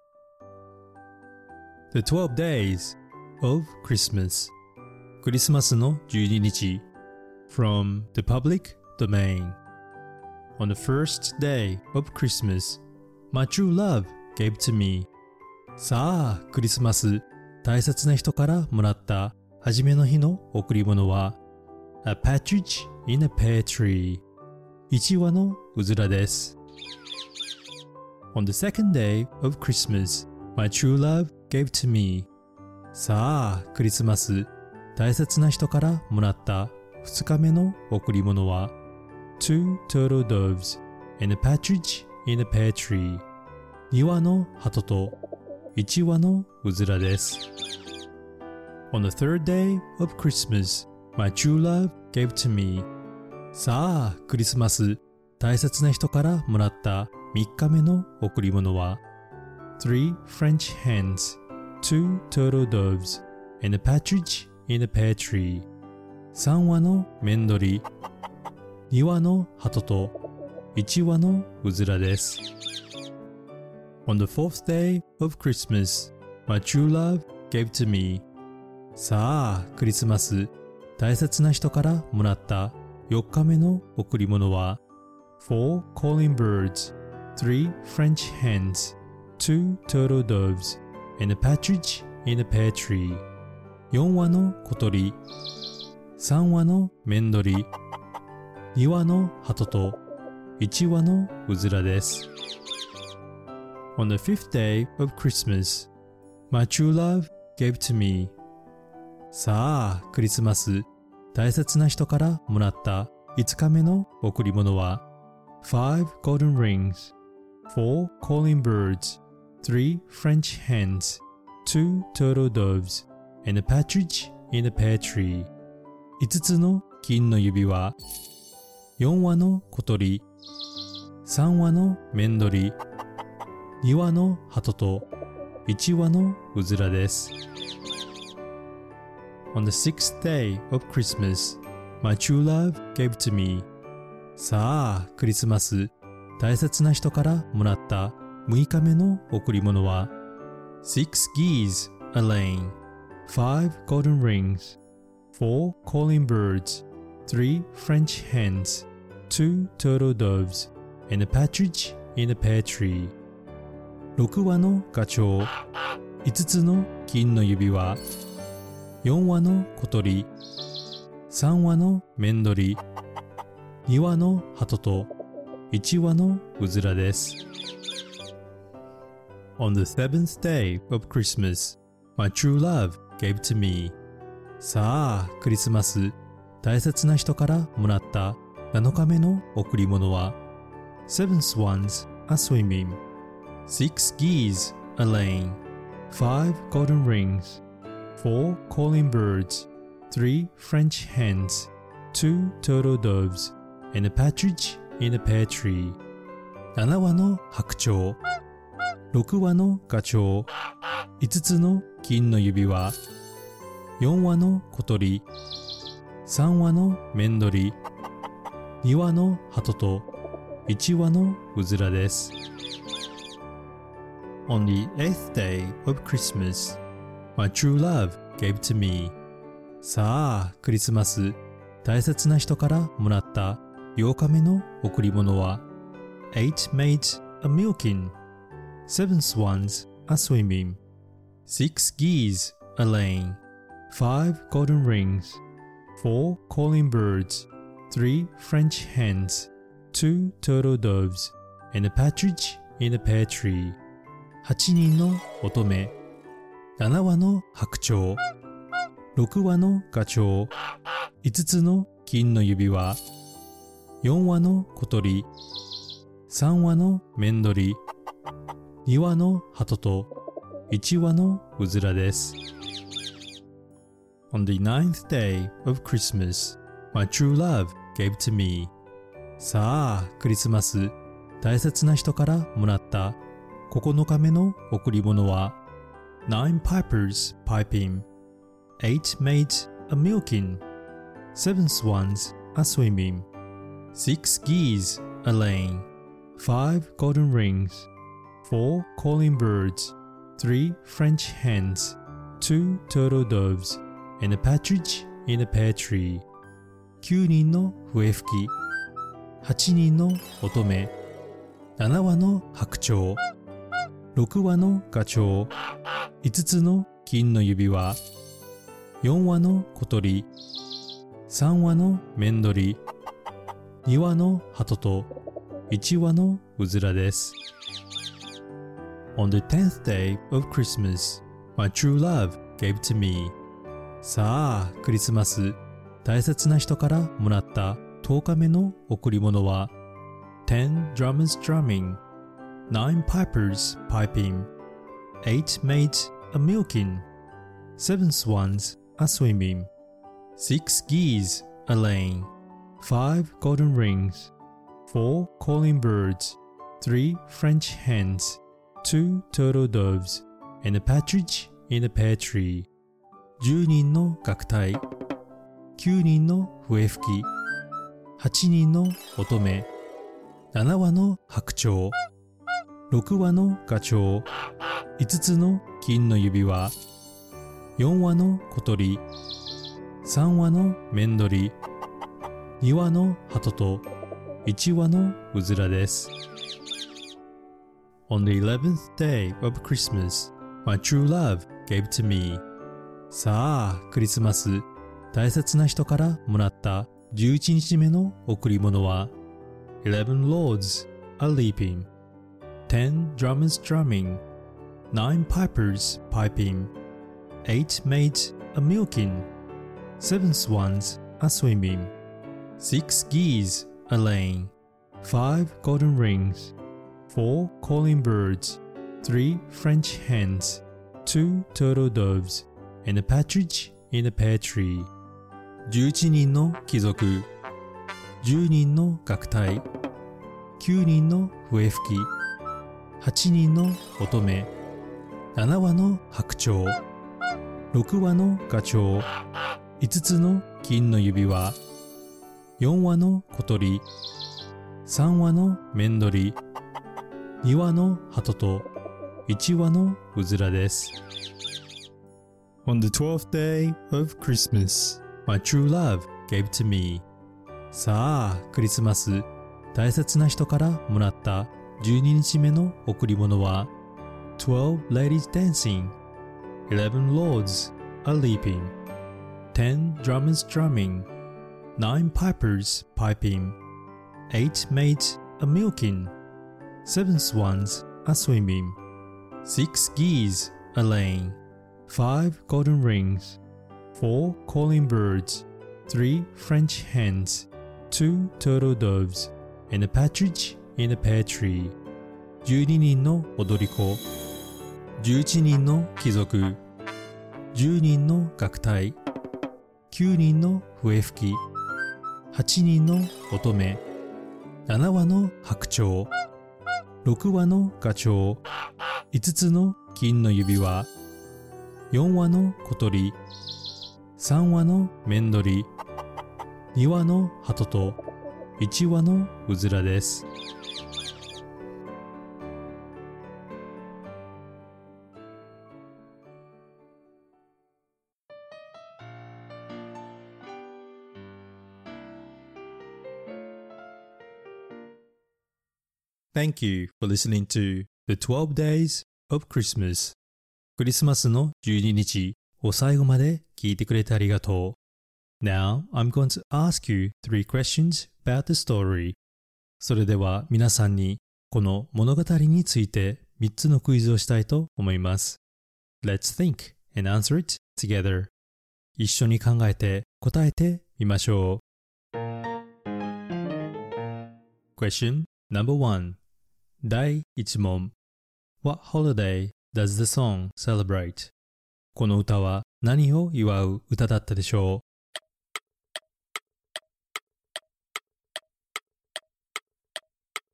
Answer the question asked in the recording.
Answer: It's to celebrate Christmas